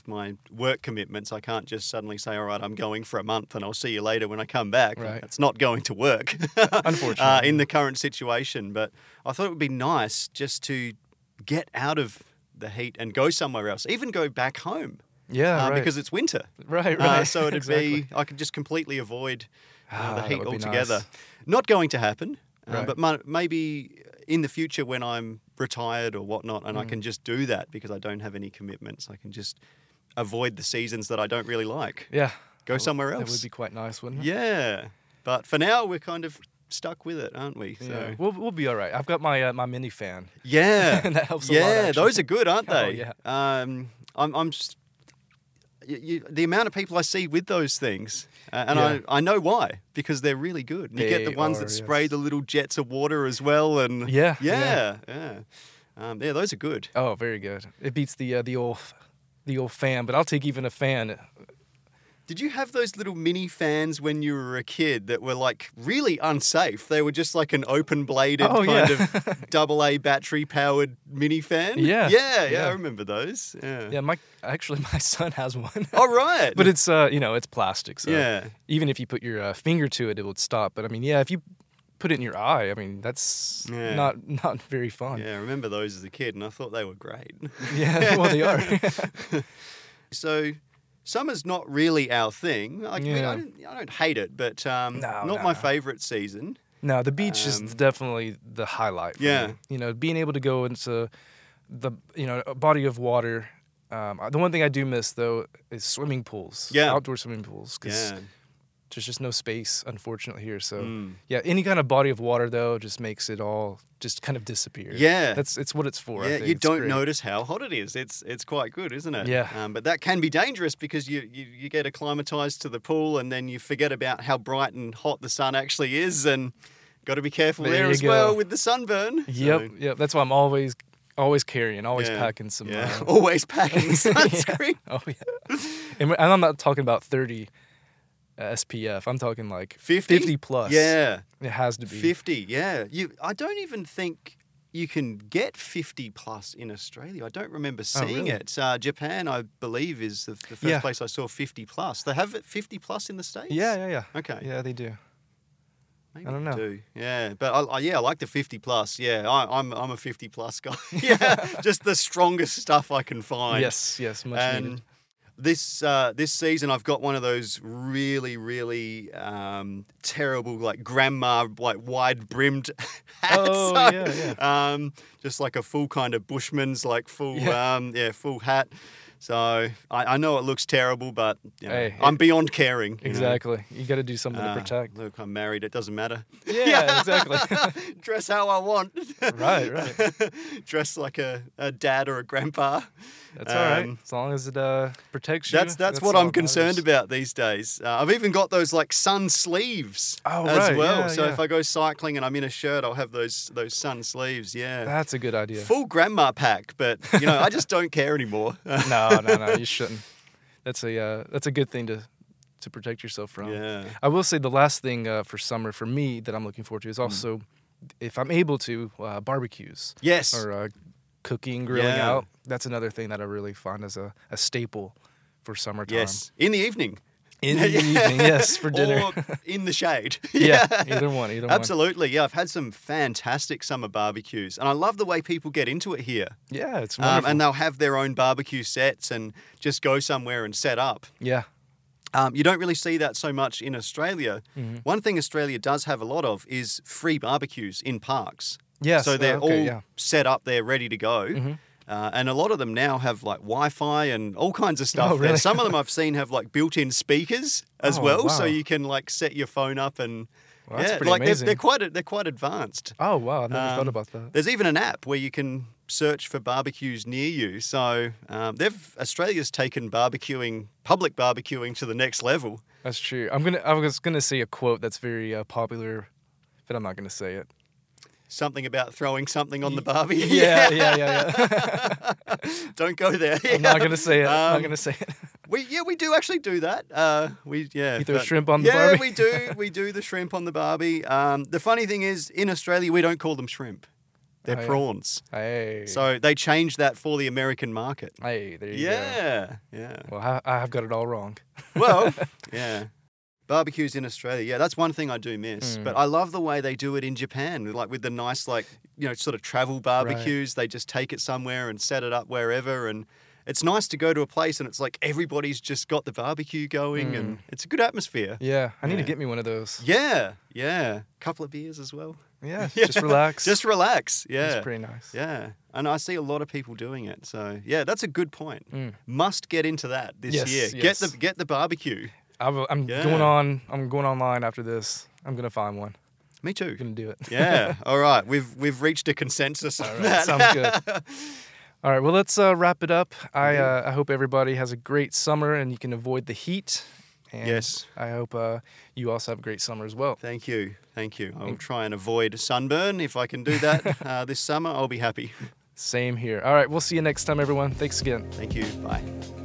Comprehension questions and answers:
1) What does Kevin miss during summer?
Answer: Swimming pools